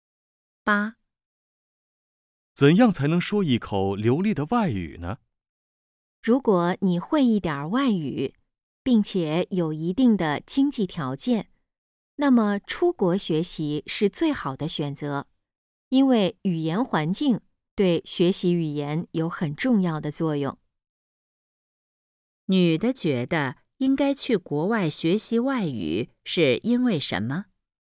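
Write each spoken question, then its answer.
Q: 女的觉得应该去国外学习外语是因为什么?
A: 语言环境对学习语言有很重要的作用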